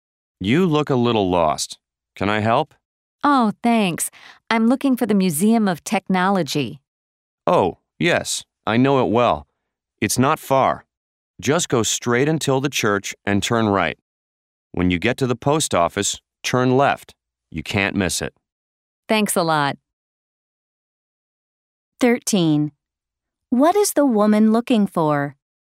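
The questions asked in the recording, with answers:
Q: What is the woman looking for?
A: The Museum of Technology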